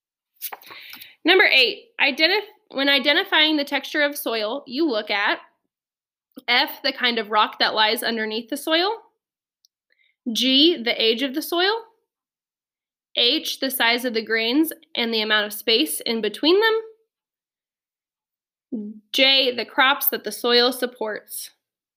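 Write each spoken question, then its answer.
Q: When identifying the texture of soil, you look at F, the kind of rock that lies underneath the soil.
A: H: the size of the grains and the amount of space in between them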